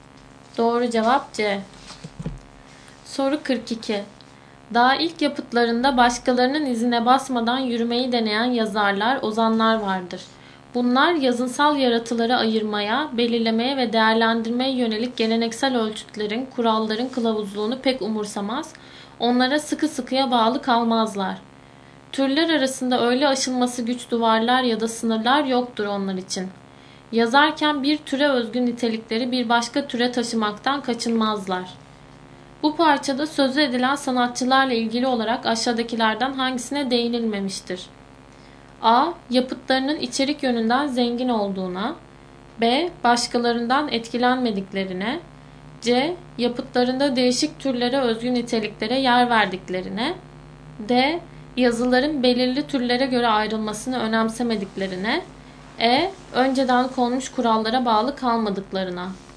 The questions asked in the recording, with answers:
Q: Bu parçada sözü edilen sanatçılarla ilgili olarak aşağıdakilerden hangisine değinilmemiştir?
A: Doğru cevap A.